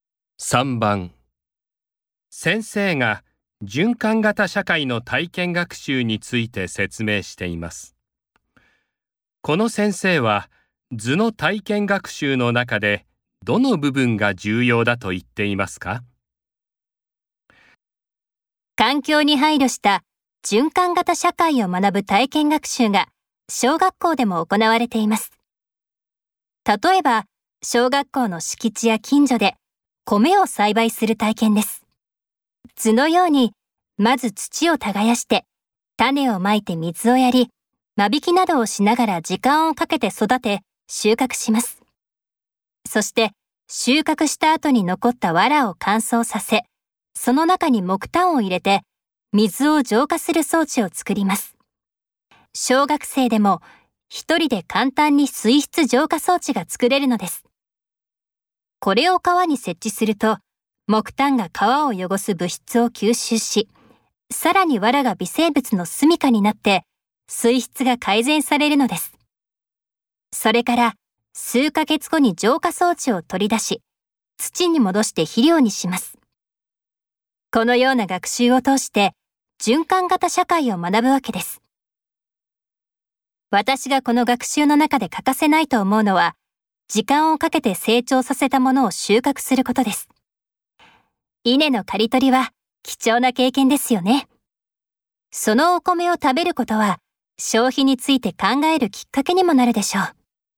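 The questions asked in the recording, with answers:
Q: この先生は図の体験学習の中でどの部分が重要だと言っていますか?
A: 時間をかけて成長させた稲(米)を収穫すること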